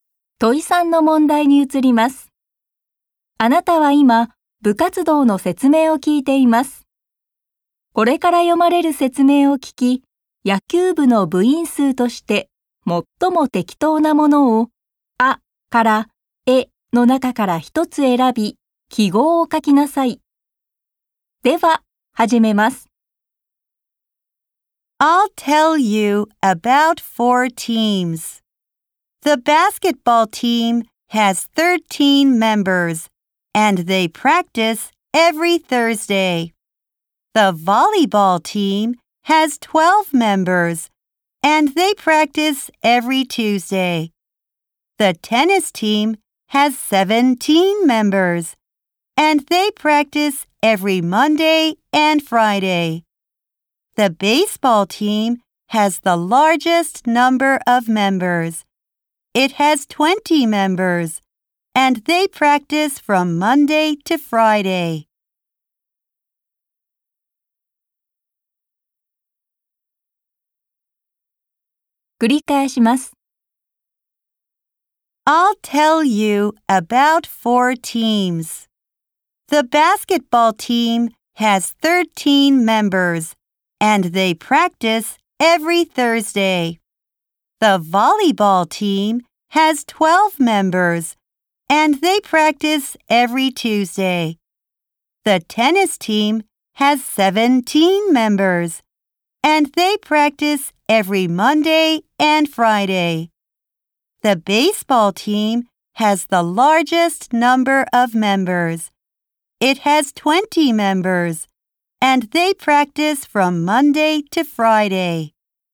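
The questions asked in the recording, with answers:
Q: 野球部の部員数として、最も適当なものを、あから、えの中から一つ選び、記号を書きなさい。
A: 20人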